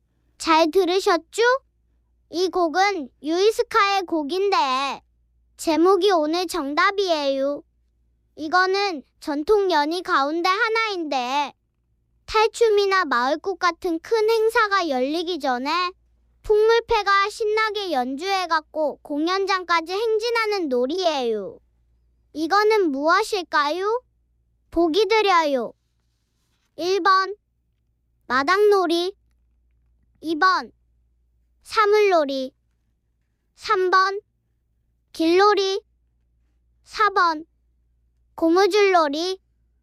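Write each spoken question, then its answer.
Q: 이거는 무엇일까요? 보기 드려요. 1번 마당놀이, 2번 사물놀이, 3번 길놀이, 4번 고무줄놀이.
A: 3: 길놀이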